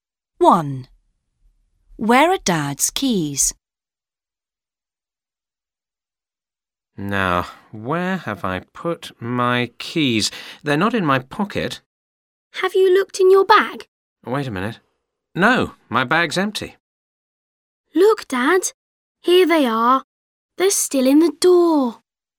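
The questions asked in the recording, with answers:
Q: Where are Dad's keys?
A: In the door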